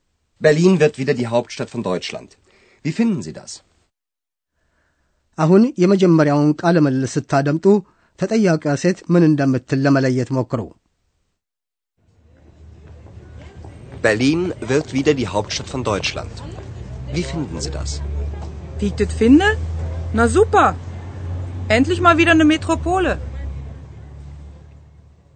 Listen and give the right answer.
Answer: ሴትየዋ በበርሊን ያነጋገር ዘዬ የተሰማትን ደስታ ትገልጻለች። በርሊን መልሳ ዋና ከተማ መሆኗን ግሩም አድርጋ ነው ያገኘችው።